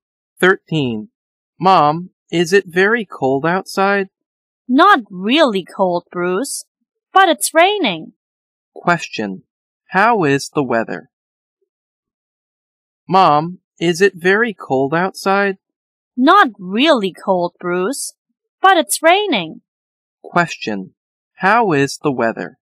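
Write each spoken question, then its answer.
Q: How is the weather?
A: Rainy, not very cold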